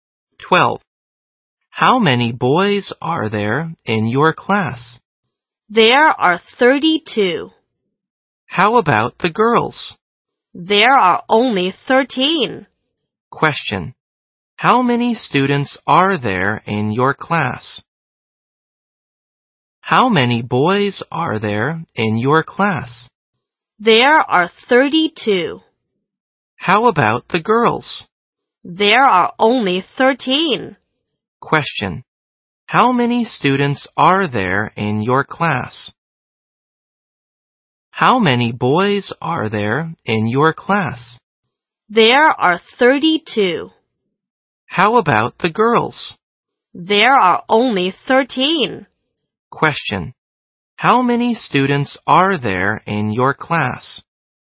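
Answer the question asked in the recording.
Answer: 45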